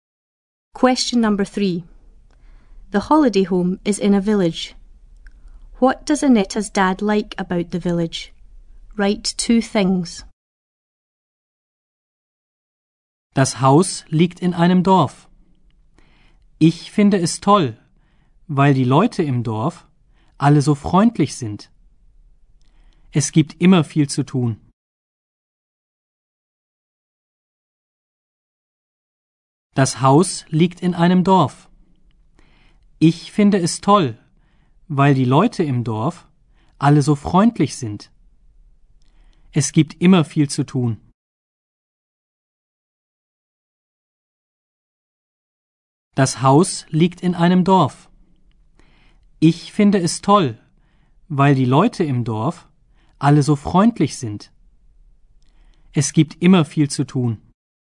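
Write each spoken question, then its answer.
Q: What does Annette's dad like about the village?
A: The people in the village are all so friendly; there is always a lot to do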